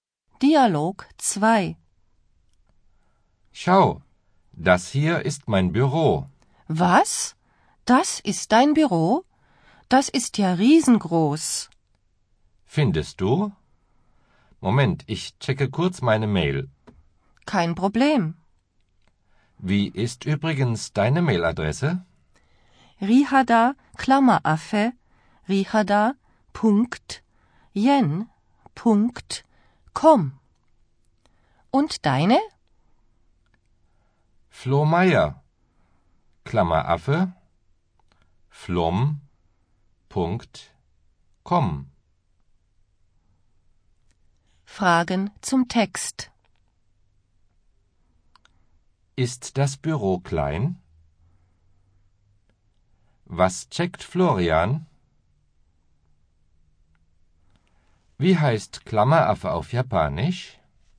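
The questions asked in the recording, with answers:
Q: Ist das Büro klein?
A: Nein, es ist riesengroß

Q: Was checkt Florian?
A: Seine Mail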